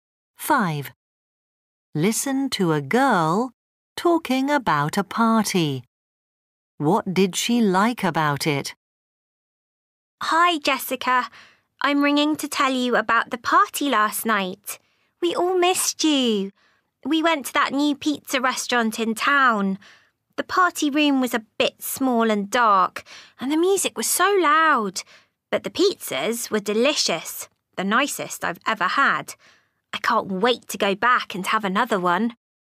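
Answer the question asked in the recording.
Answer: The pizzas.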